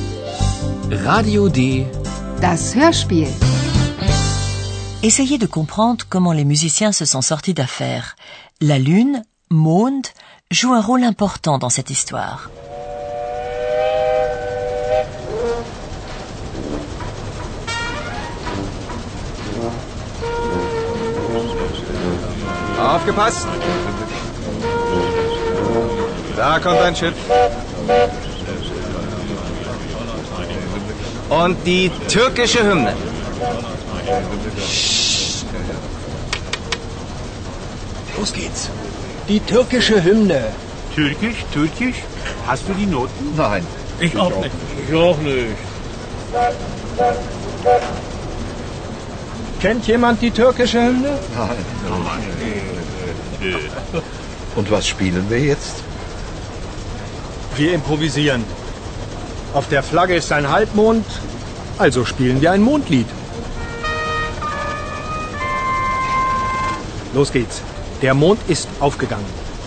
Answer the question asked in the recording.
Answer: Les musiciens, vous l'aurez compris, improvisent.